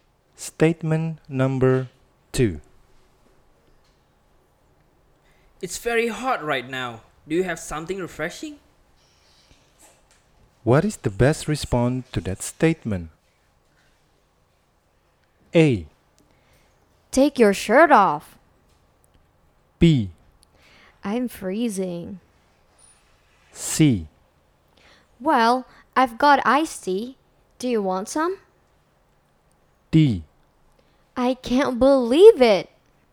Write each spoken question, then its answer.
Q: What is the best response to that statement?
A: Nomor dua, jawabannya C atau C.